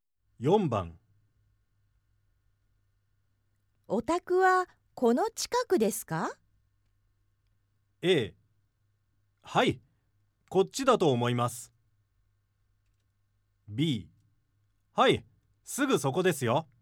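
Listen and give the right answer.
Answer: B: はい、すぐそこですよ。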